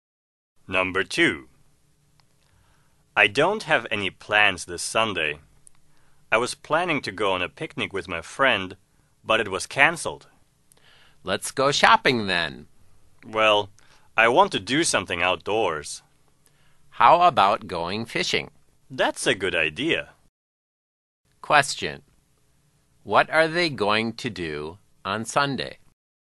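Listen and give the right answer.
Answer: Go fishing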